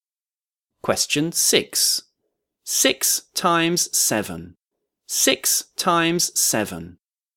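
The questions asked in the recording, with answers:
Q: 6 times 7. 6 times 7.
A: 42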